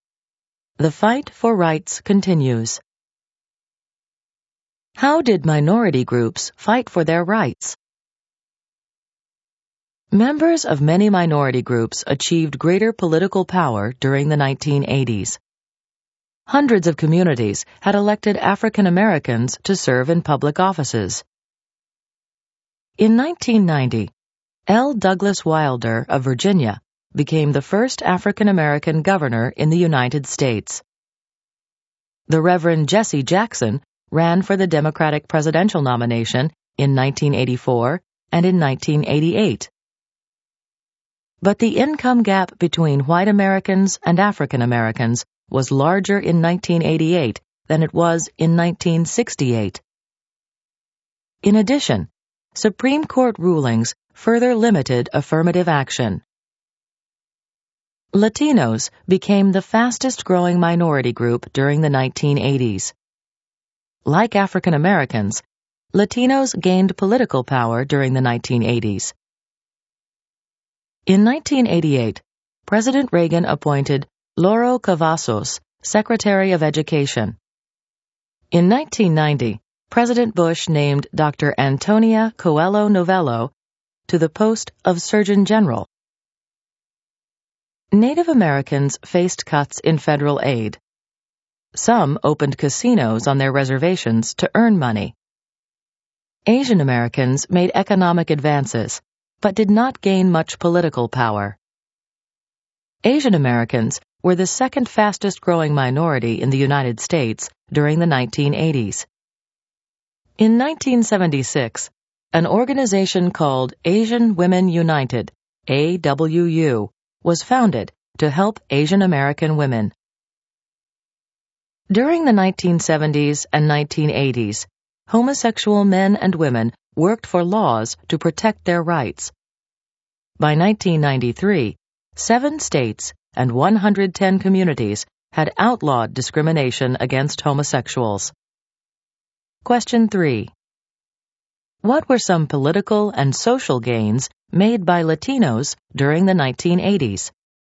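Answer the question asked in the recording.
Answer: They gained political power and became the fastest-growing minority; Lauro Cavazos became Secretary of Education and Antonia Coello Novello became Surgeon General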